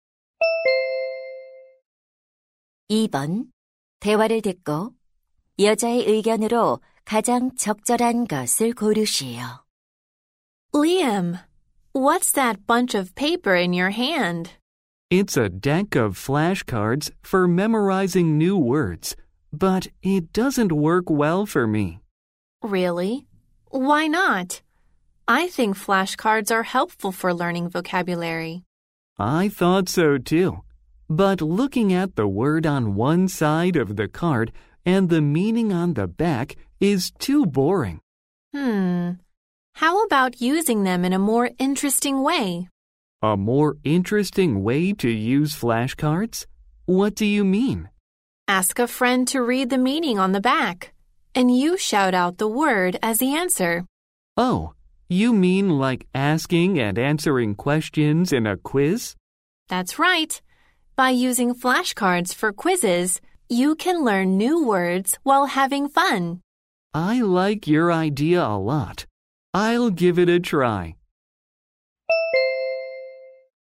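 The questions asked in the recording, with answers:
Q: 대화를 듣고 여자의 의견으로 가장 적절한 것을 고르시오.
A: 플래시카드를 퀴즈처럼 활용하면 재미있게 단어를 학습할 수 있다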